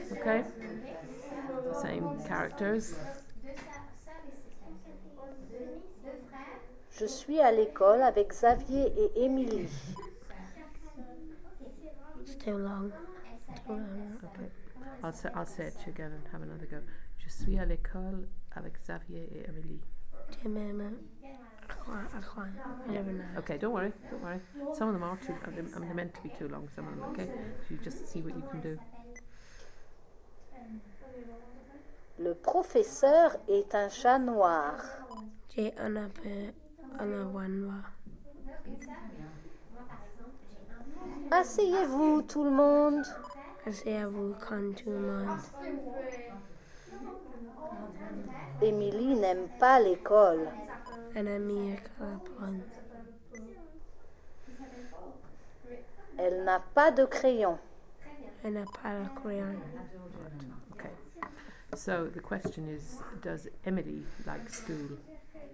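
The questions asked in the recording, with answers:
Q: does Emily like school?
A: No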